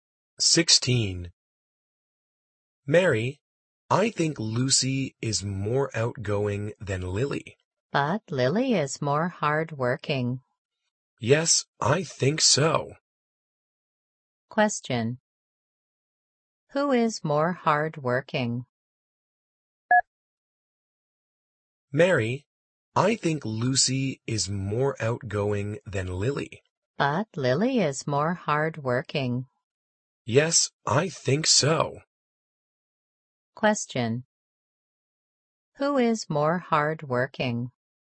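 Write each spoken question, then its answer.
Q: Who is more hardworking?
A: Lily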